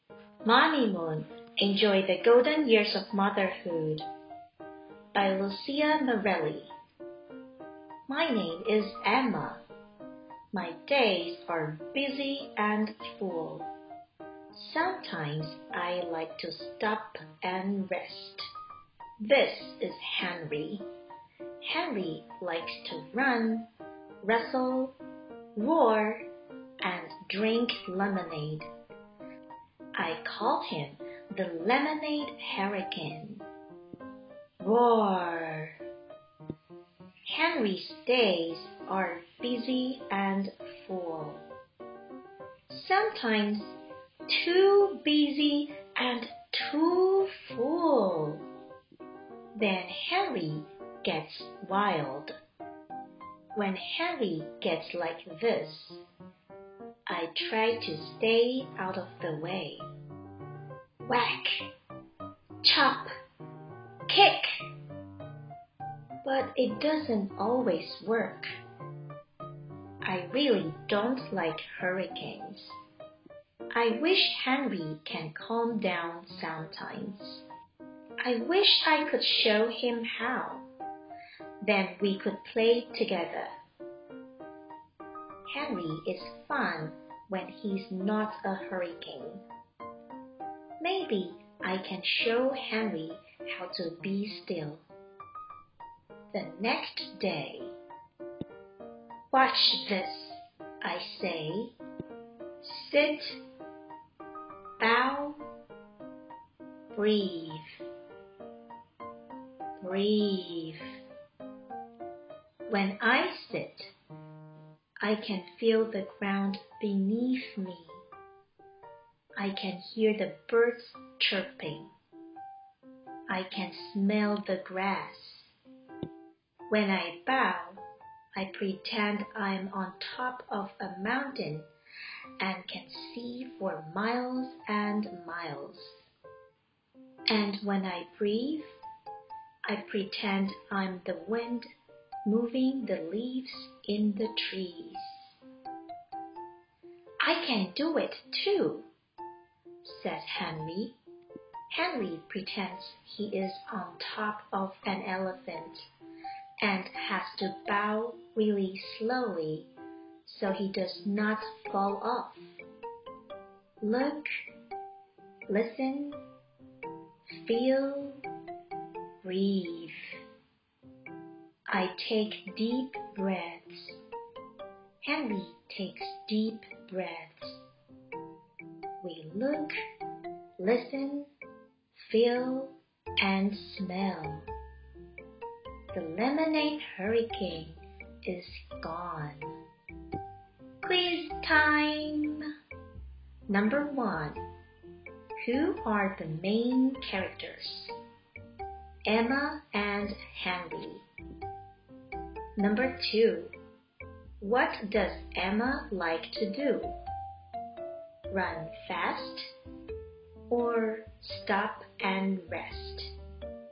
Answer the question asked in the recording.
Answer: The answer is stop and rest.